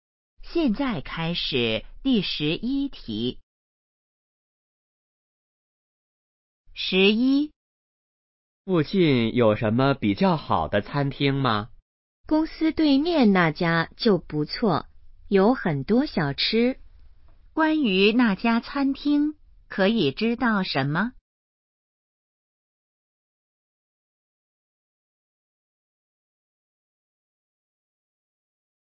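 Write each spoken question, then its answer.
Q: 关于那家餐厅,可以知道什么?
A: 在公司对面,有很多小吃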